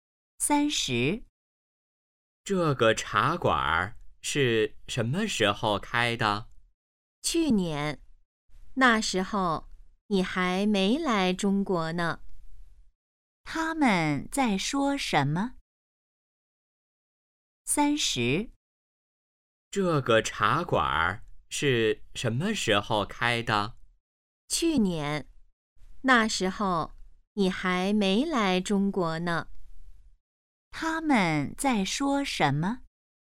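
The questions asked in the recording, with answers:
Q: 他们在说什么?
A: 茶馆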